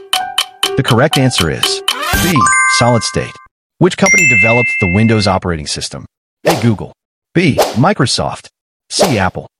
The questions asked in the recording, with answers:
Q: Which company developed the Windows operating system?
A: The correct answer is B. Microsoft.